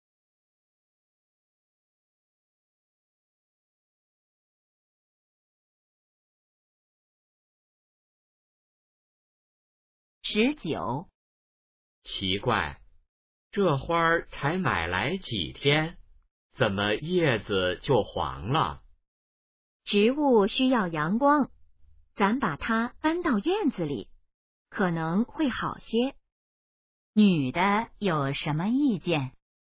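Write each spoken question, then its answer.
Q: 女的有什么意见?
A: 把花搬到院子里晒太阳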